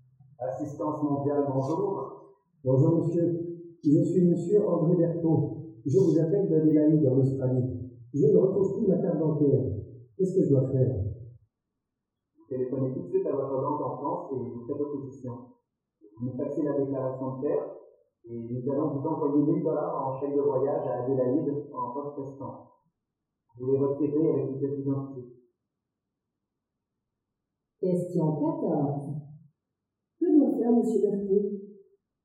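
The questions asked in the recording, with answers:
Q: Que doit faire monsieur Berton?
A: Téléphoner tout de suite à sa banque en France pour faire opposition, puis faxer la déclaration de perte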